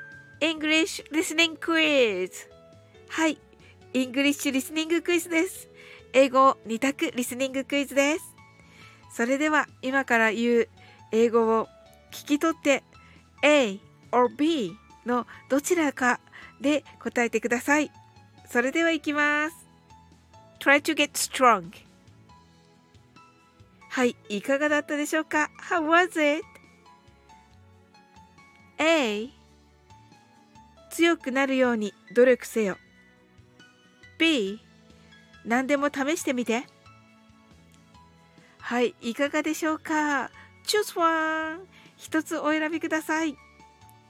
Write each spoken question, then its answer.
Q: それでは今から言う英語を聞き取って A or B のどちらかで答えてください。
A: The answer is A、 強くなるように努力せよでした。